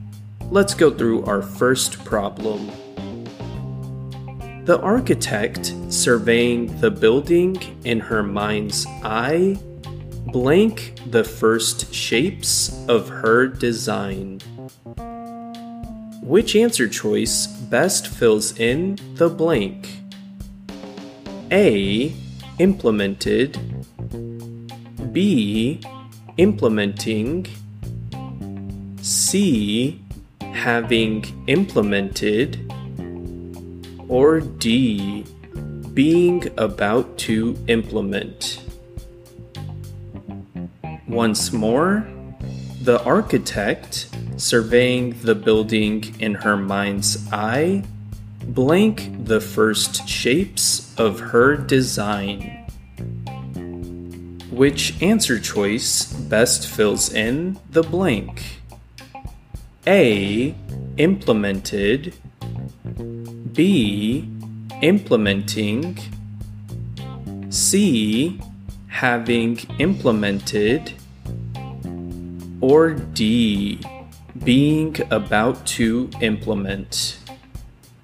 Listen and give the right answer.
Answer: Out of these, the first one, choice A, stands on its own as a full sentence, making it the correct answer.